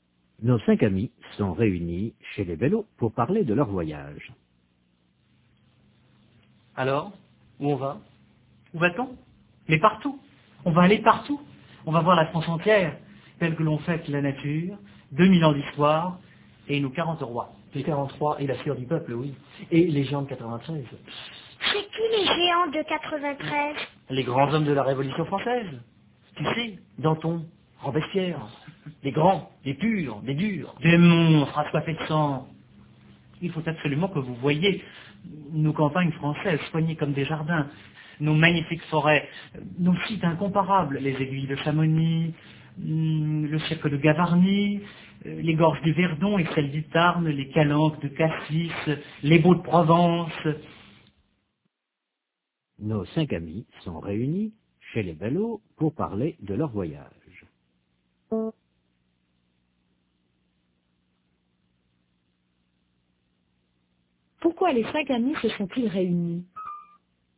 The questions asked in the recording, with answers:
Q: Pourquoi les cinq amis se sont-ils réunis?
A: Pour parler de leur voyage.